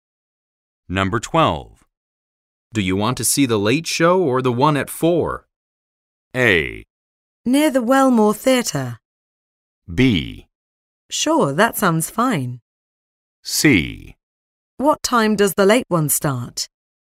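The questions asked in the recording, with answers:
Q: Do you want to see the late show or the one at 4?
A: C: What time does the late one start?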